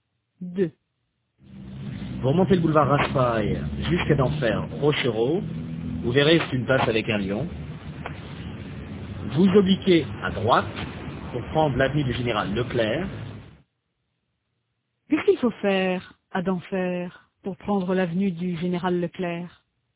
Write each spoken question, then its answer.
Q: Qu'est-ce qu'il faut faire à Denfert pour prendre l'avenue du général Leclerc?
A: Il faut obliquer à droite.